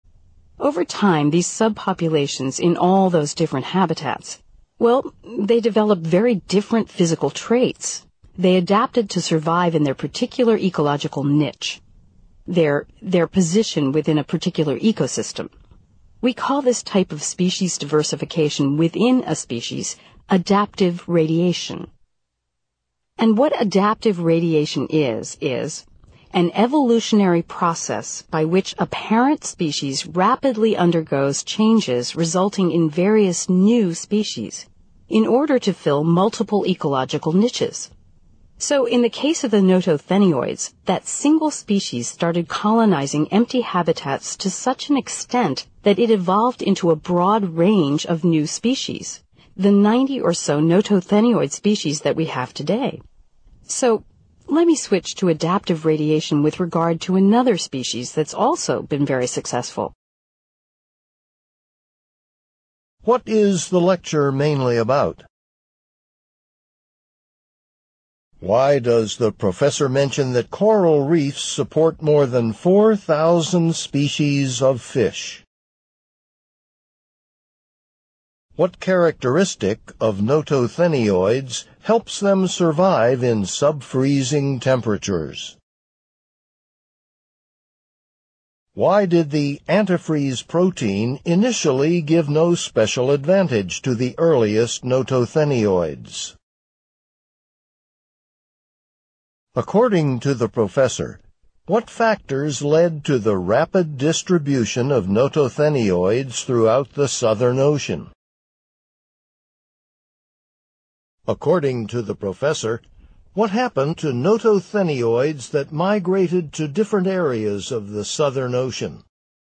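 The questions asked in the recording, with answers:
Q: According to the professor, what happened to notothenioids that migrated to different areas of the Southern Ocean?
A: They developed very different physical traits, adapting to their niches and evolving into about 90 new species (adaptive radiation)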